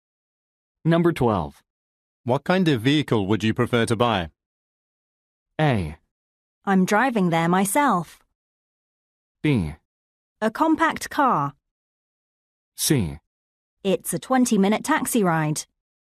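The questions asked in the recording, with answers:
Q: What kind of vehicle would you prefer to buy?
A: B: A compact car.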